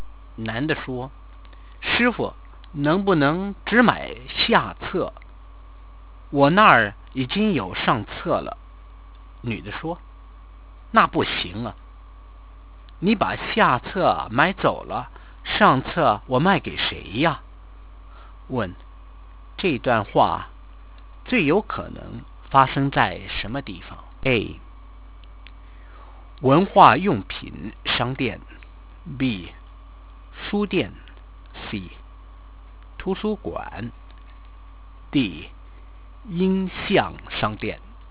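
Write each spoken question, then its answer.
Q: 这段话最有可能发生在什么地方?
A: B: 书店。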